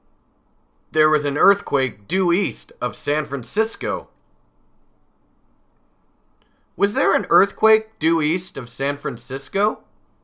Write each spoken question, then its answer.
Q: Was there an earthquake due east of San Francisco?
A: Yes, there was. There was an earthquake due east of San Francisco.